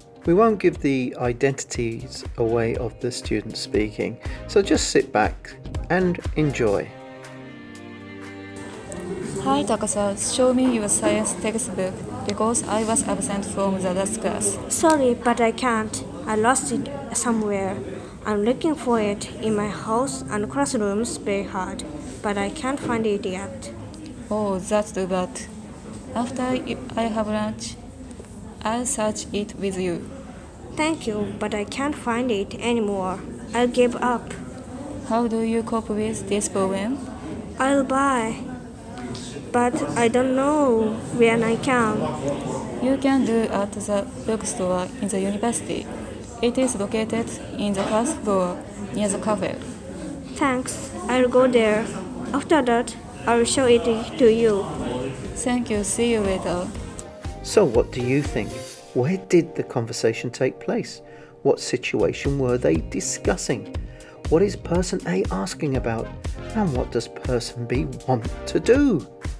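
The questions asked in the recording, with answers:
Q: What situation were they discussing?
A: Person B lost their science textbook

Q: What is person A asking about?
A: To see B's science textbook because A missed the last class

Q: And what does person B want to do?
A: Buy a new textbook (at the university bookstore)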